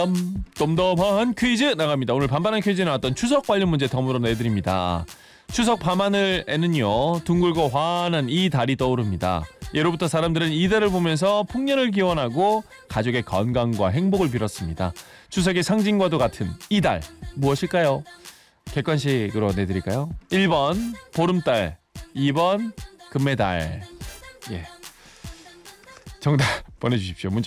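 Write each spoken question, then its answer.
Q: 추석의 상징과도 같은 이 달 무엇일까요?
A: 1번: 보름달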